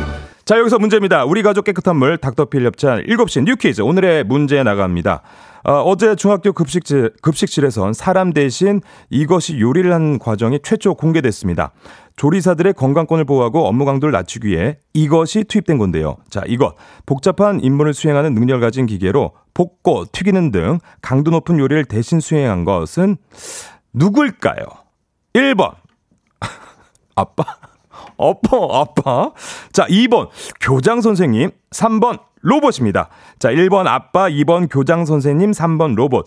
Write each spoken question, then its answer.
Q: 자, 이것. 복잡한 임무를 수행하는 능력을 가진 기계로 볶고 튀기는 등 강도 높은 요리를 대신 수행한 것은 누굴까요?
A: 정답 3번 로봇이었습니다.